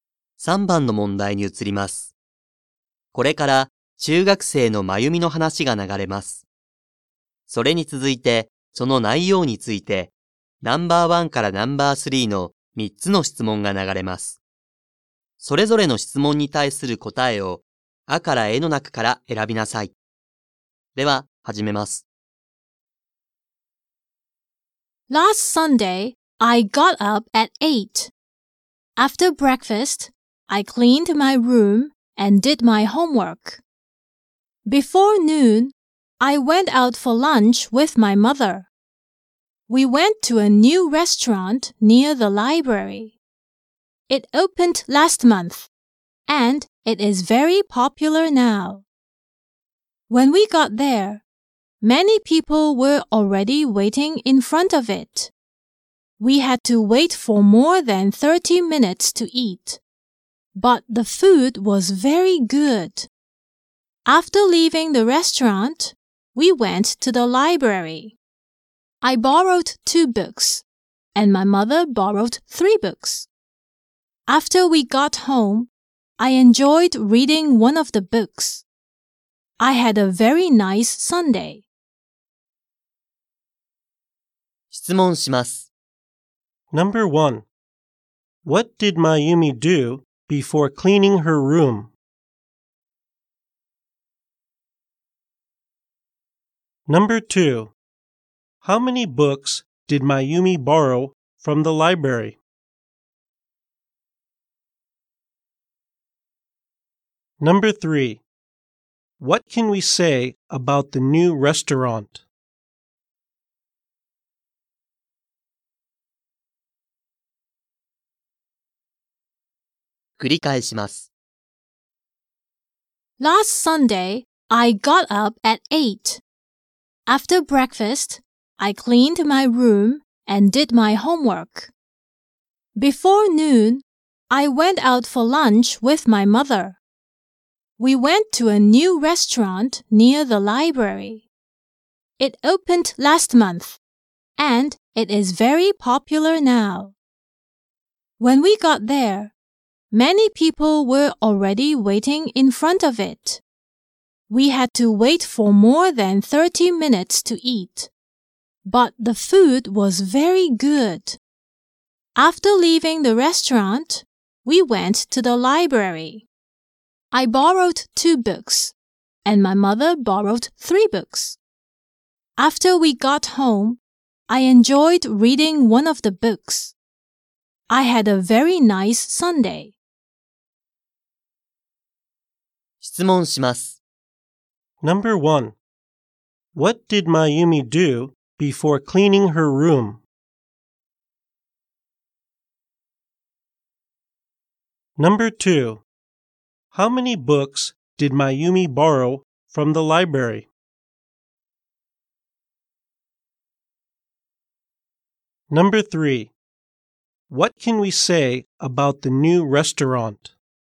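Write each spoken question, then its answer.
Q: What did Mayumi do before cleaning her room?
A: She had breakfast.

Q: How many books did Mayumi borrow from the library?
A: Two books.

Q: What can we say about the new restaurant?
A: It is very popular now; it opened last month.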